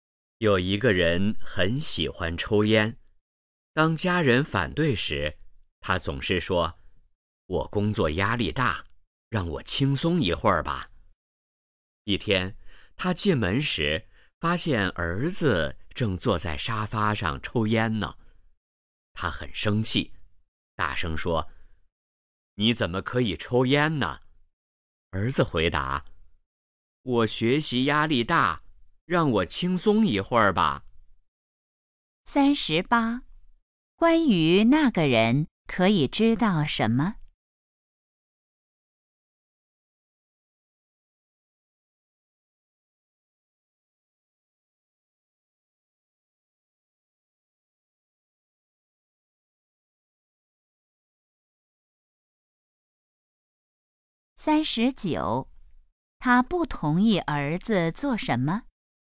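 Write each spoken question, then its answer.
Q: 他不同意儿子做什么?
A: 抽烟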